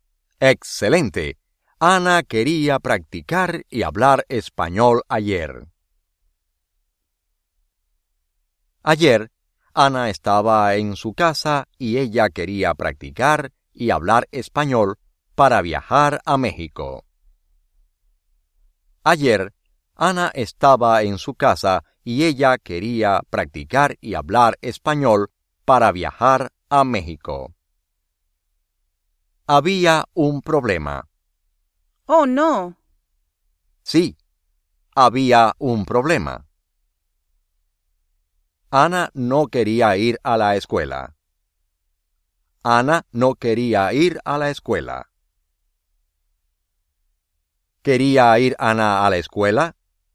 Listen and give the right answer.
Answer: No.